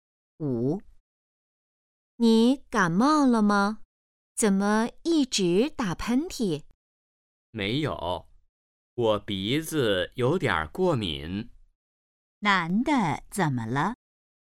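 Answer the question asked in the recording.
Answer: 鼻子过敏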